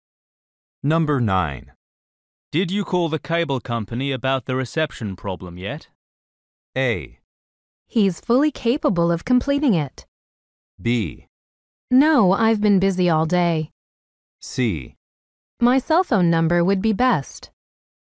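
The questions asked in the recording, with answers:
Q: Did you call the cable company about the reception problem yet?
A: B: No, I've been busy all day.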